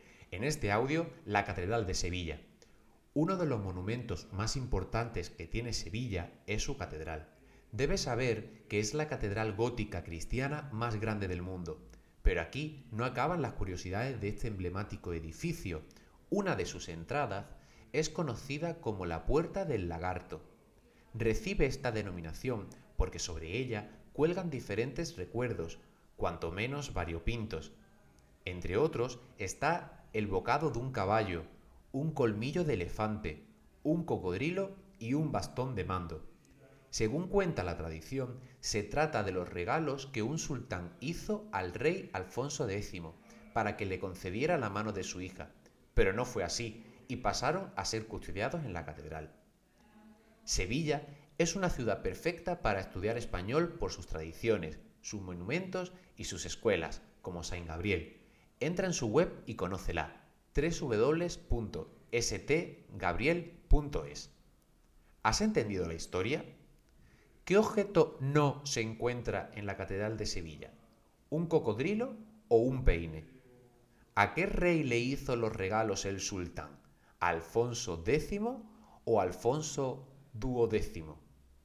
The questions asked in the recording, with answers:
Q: ¿Qué objeto no se encuentra en la Catedral de Sevilla?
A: no hay ningún peine en la Catedral de Sevilla

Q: ¿A qué rey le hizo los regalos el sultán?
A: fue al rey Alfonso X